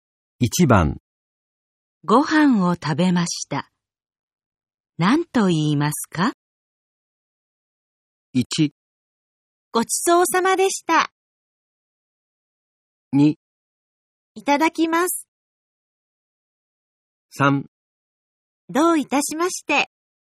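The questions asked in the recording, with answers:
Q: ご飯を食べました。何と言いますか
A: 1: ごちそうさまでした。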